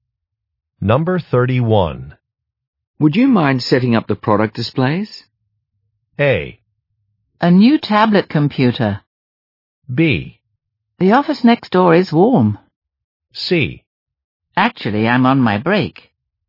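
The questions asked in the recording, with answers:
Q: Would you mind setting up the product displays?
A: C: Actually, I'm on my break.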